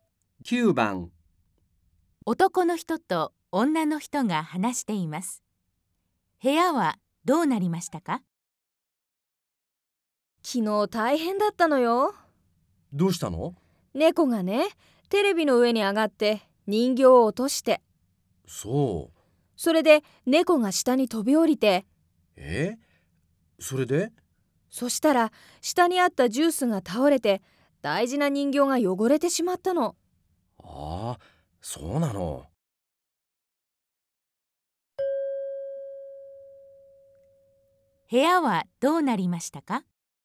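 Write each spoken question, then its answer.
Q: 部屋はどうなりましたか?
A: 人形が落ちて、ジュースが倒れ、人形が汚れた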